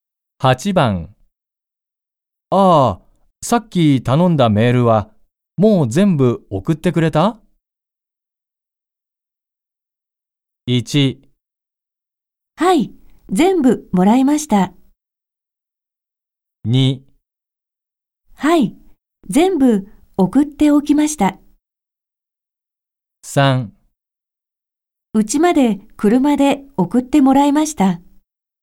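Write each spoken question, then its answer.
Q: ああ、さっき頼んだメールはもう全部送ってくれた?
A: 2: はい、全部送っておきました。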